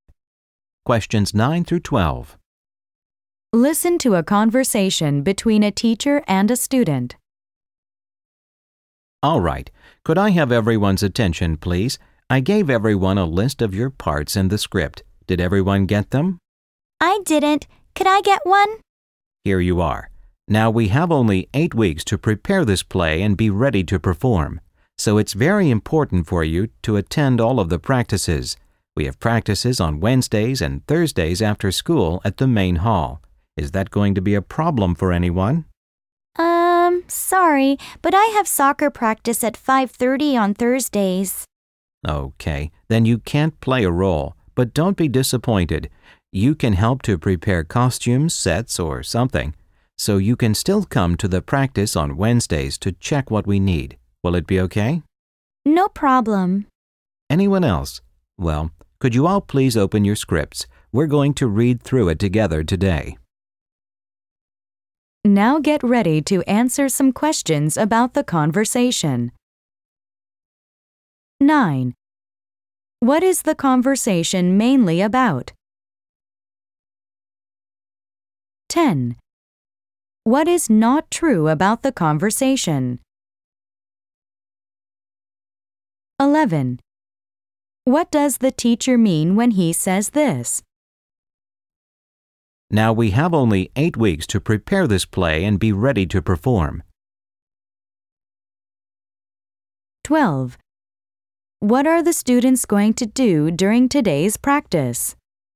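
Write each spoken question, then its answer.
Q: What does the teacher mean when he says this?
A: Time is short, so everyone must attend all of the practices

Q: What are the students going to do during today's practice?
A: Read through the script together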